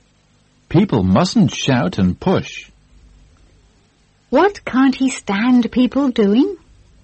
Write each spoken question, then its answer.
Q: What can't he stand people doing?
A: He can't stand people shouting and pushing.